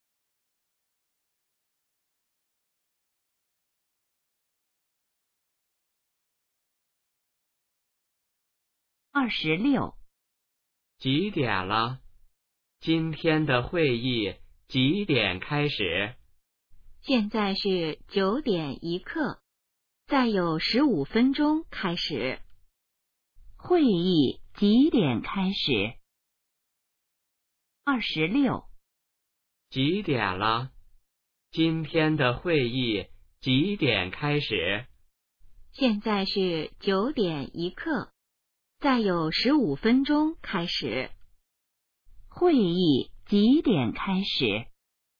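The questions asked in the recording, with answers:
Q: 会议几点开始?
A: 9:16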